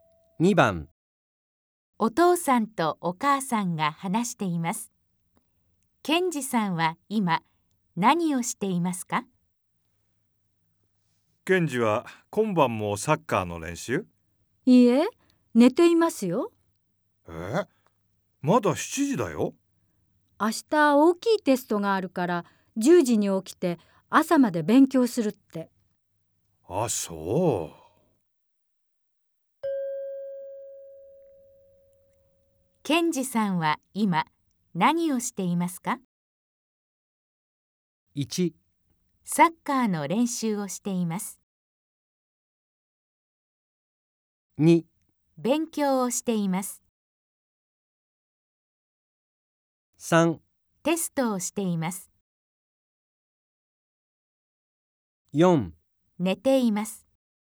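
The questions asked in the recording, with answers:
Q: ケンジさんは今何をしていますか?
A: 4: 寝ています。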